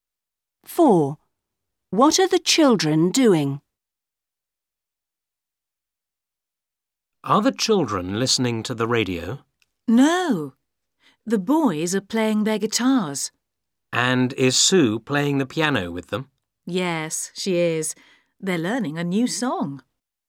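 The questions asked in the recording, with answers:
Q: What are the children doing?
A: The boys are playing guitars and Sue is playing the piano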